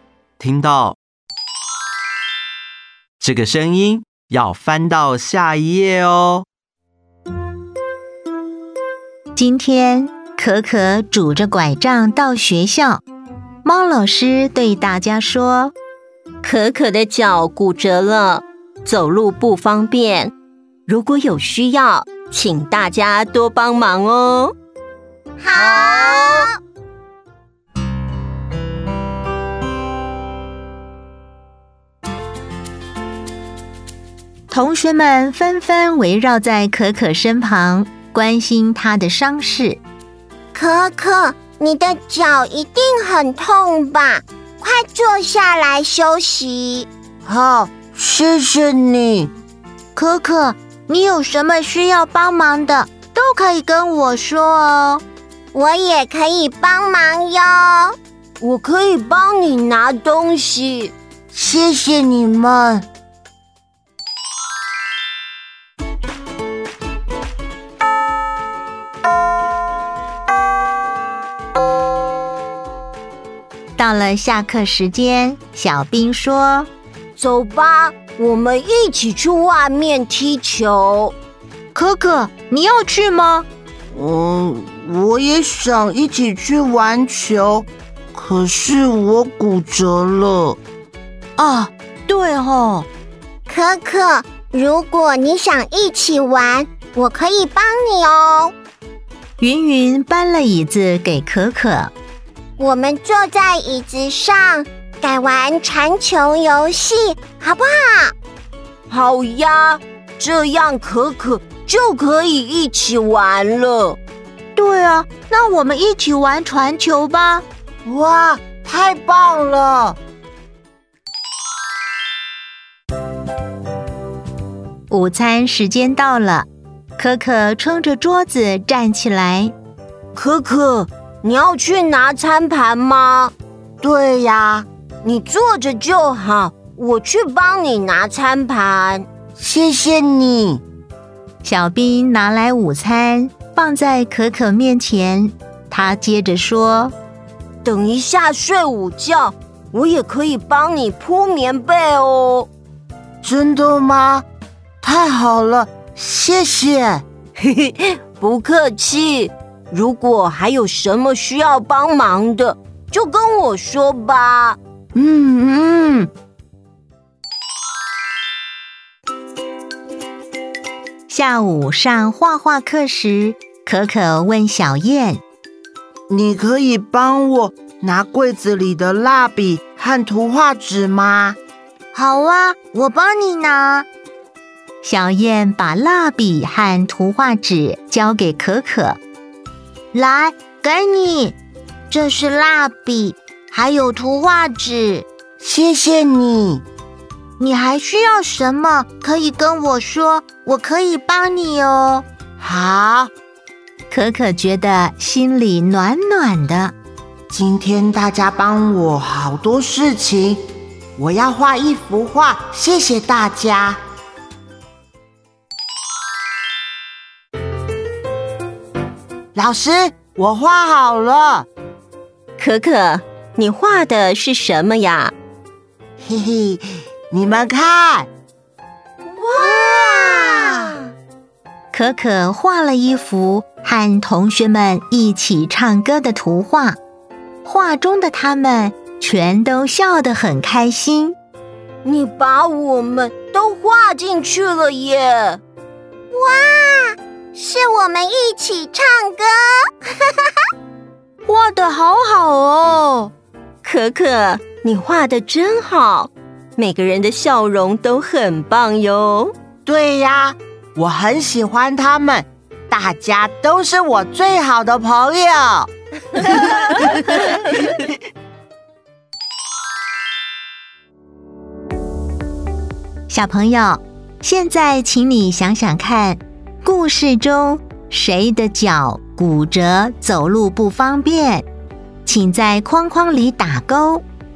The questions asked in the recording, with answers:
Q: 故事中谁的脚骨折,走路不方便,请在框框里打勾。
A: 可可,